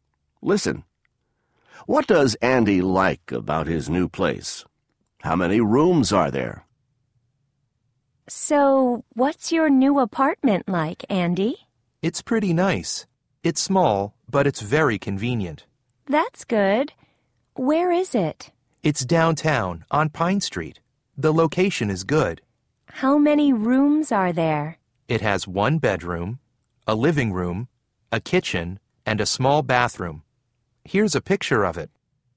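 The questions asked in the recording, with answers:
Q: What does Andy like about his new place?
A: It's very convenient; the location is good (downtown, on Pine Street).

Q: How many rooms are there?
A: Four: one bedroom, a living room, a kitchen, and a small bathroom.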